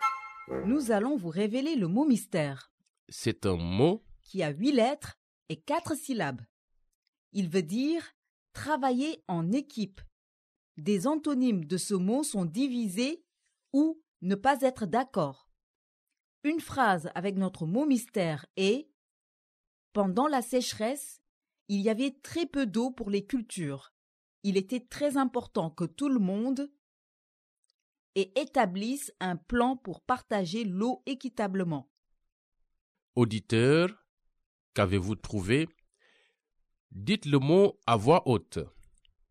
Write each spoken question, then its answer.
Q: Auditeur, qu'avez-vous trouvé?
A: Le mot mystère d'aujourd'hui est coopérer.